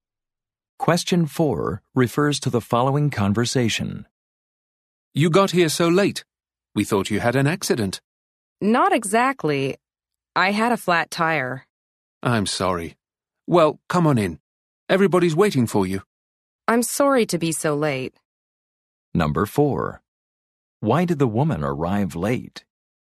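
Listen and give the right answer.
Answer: She had a flat tire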